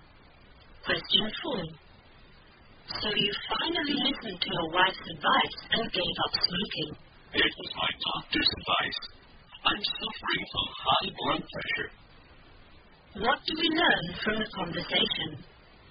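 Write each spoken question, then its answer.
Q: What do we learn from the conversation?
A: The man gave up smoking on his doctor's advice because he has high blood pressure.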